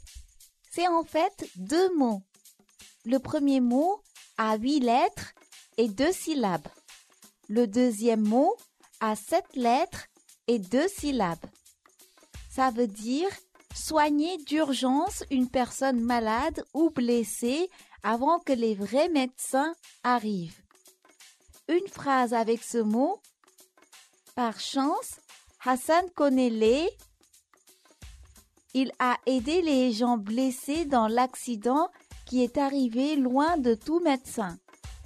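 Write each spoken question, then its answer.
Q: Une phrase avec ce mot. Par chance, Hassan connaît les...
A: premiers secours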